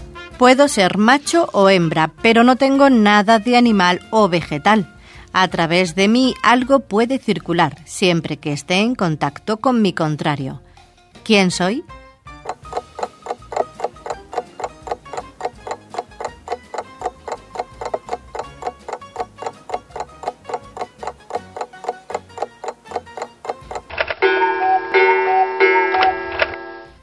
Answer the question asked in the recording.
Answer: Solución, una toma eléctrica.